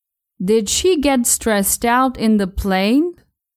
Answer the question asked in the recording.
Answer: No, she got stressed out at the security checkpoint.